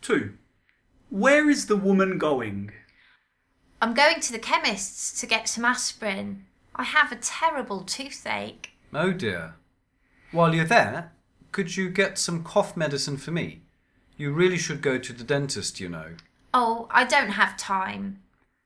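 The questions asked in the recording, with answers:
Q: Where is the woman going?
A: To the chemist's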